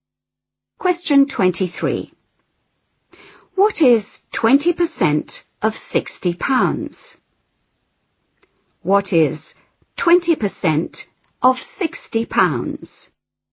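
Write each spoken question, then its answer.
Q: What is 20% of 60 pounds?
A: £12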